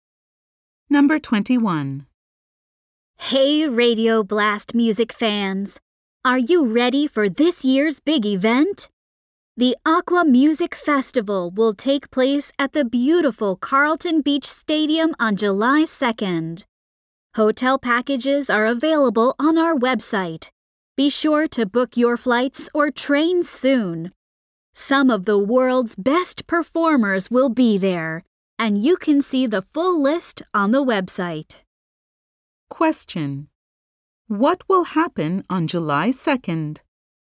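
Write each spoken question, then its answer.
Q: What will happen on July 2nd?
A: The Aqua Music Festival will take place at Carlton Beach Stadium.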